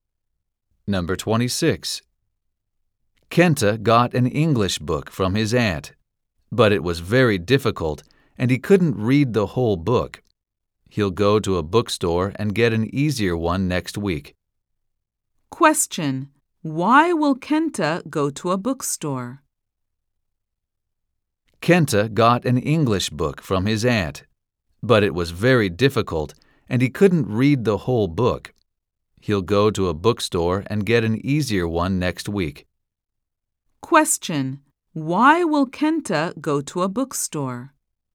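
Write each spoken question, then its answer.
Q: Why will Kenta go to a bookstore?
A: To get an easier English book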